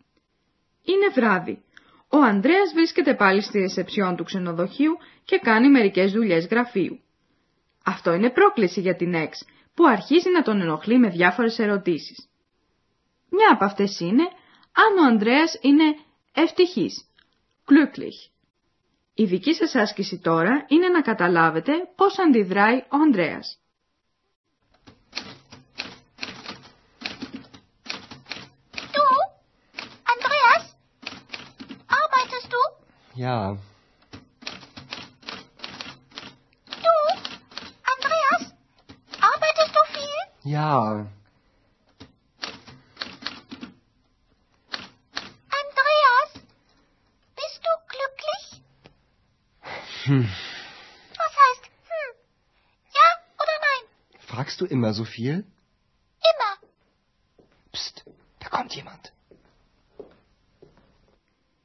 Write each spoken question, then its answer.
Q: Η δική σας άσκηση τώρα είναι να καταλάβετε πώς αντιδράει ο Ανδρέας.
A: Στην ερώτηση της Εξ, ο Ανδρέας μουρμουρίζει κάτι αναποφάσιστα και αντί άλλης απάντησης της κάνει την αντερώτηση, αν ρωτάει πάντοτε τόσα πολλά.